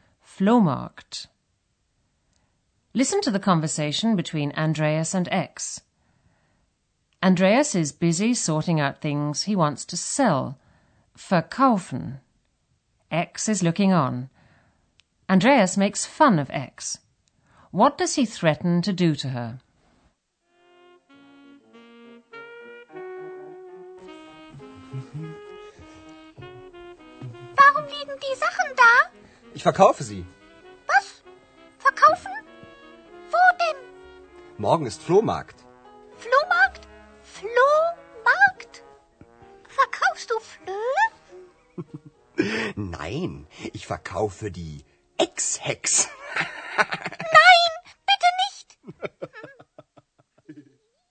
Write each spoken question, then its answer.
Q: What does he threaten to do to her?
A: Andreas threatens to sell X along with his belongings.